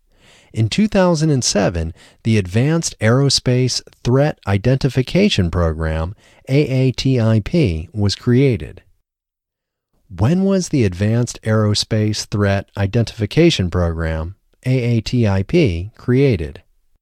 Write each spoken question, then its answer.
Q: When was the Advanced Aerospace Threat Identification Program, AATIP, created?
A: The Advanced Aerospace Threat Identification Program, AATIP, was created in 2007.